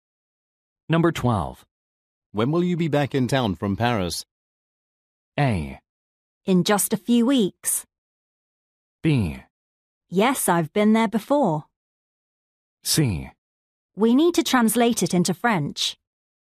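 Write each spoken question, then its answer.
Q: When will you be back in town from Paris?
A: A: In just a few weeks.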